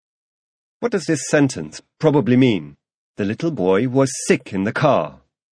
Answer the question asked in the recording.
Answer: That sentence probably means that the little boy vomited in the car.